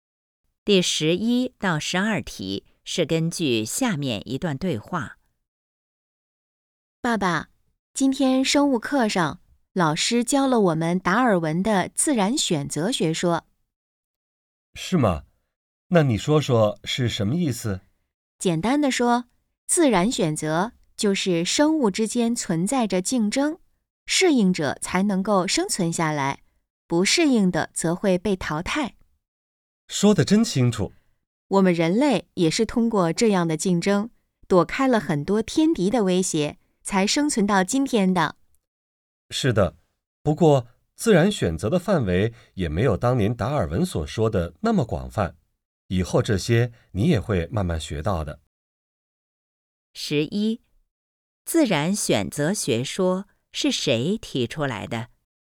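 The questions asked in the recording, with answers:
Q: 自然选择学说是谁提出来的?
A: 达尔文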